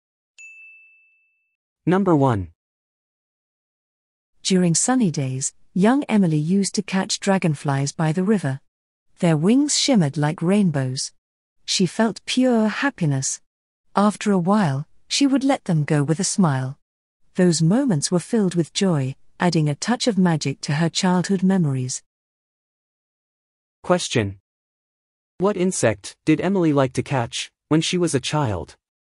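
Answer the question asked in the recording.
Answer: Dragonflies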